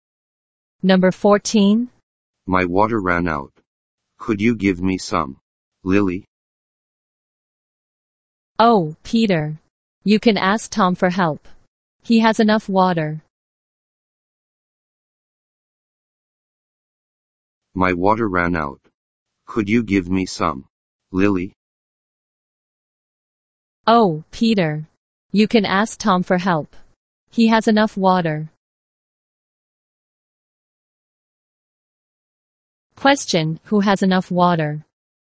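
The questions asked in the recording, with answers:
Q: Question, who has enough water?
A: Tom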